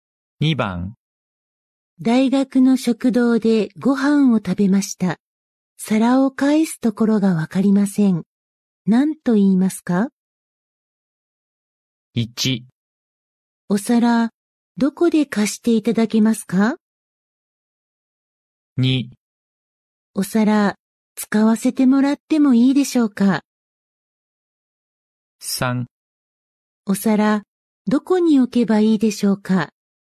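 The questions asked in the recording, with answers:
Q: 何と言いますか?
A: 3: お皿、どこに置けばいいでしょうか?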